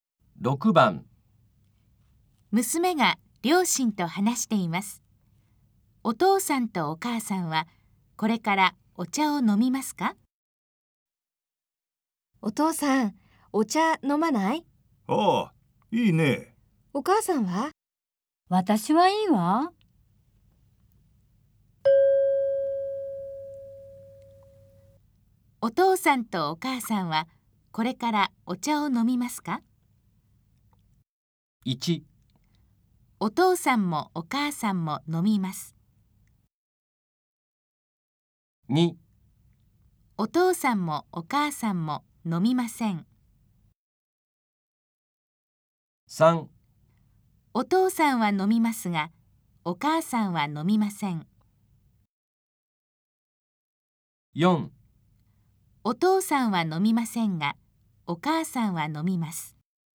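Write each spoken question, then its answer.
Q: お父さんとお母さんはこれからお茶を飲みますか?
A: 3: お父さんは飲みますが、お母さんは飲みません。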